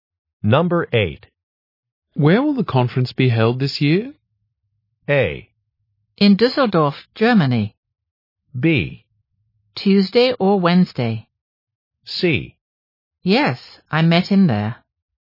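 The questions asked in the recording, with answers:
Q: Where will the conference be held this year?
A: A: In Düsseldorf, Germany.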